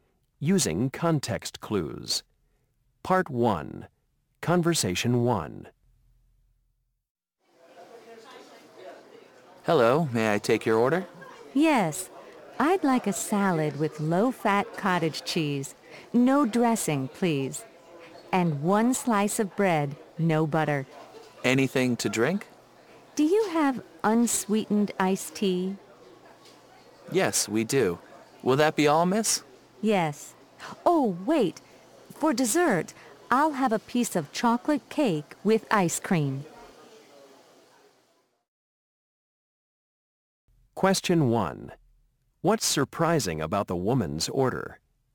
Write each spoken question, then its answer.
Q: What's surprising about the woman's order?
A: You know, before you ordered that cake, I thought you were on a diet.